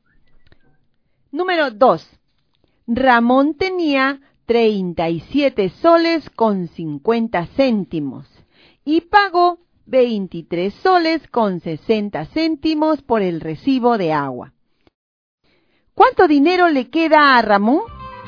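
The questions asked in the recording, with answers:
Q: ¿Cuánto dinero le queda a Ramón?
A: 13,90 soles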